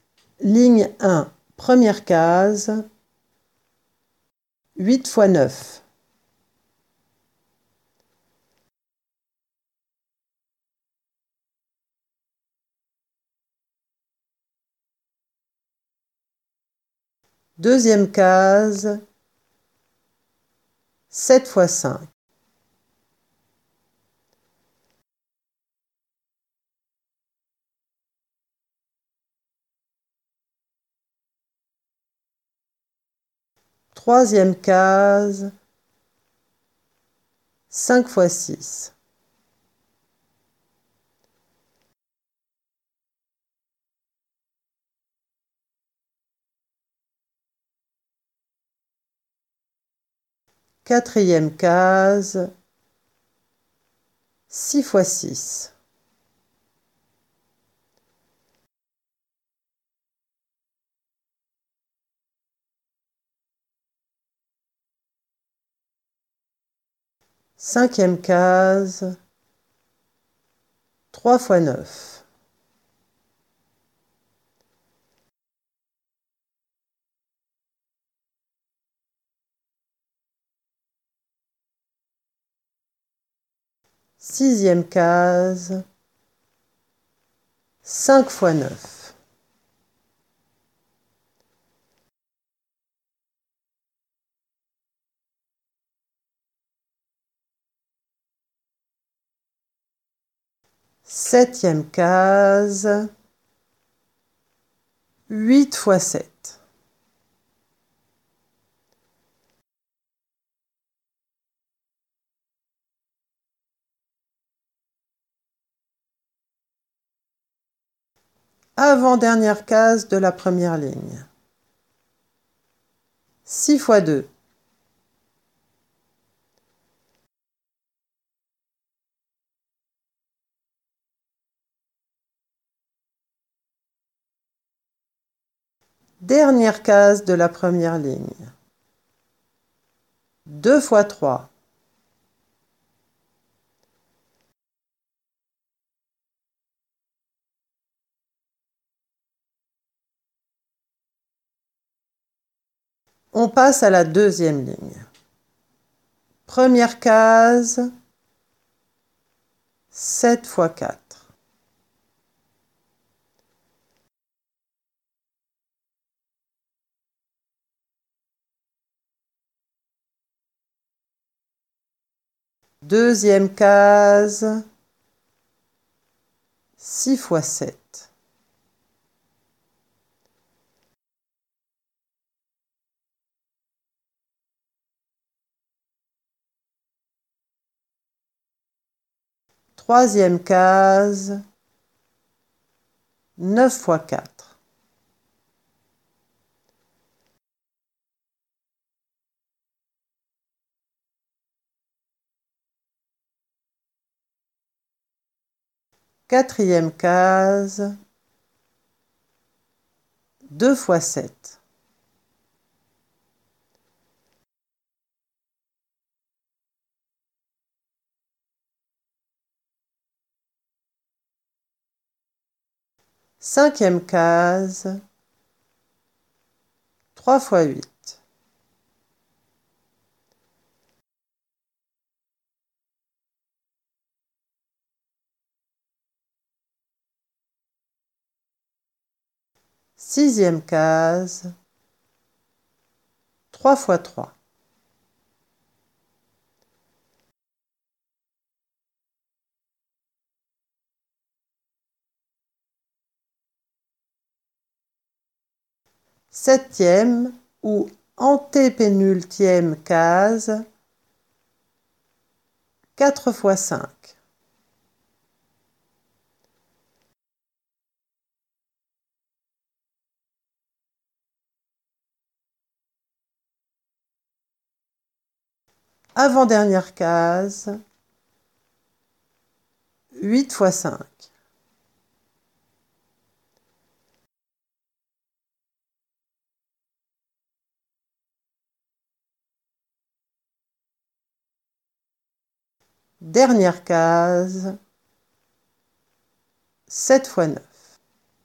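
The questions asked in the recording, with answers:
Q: 6 fois 6.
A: 36

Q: 3 fois 9.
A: 27

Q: 5 fois 9.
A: 45

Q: 8 fois 7.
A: 56

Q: 6 fois 2.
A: 12

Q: 9 fois 4.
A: 36

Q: 2 fois 7.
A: 14

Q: 3 fois 8.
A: 24

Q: 4 fois 5.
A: 20

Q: 8 fois 5.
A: 40

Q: 7 fois 9.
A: 63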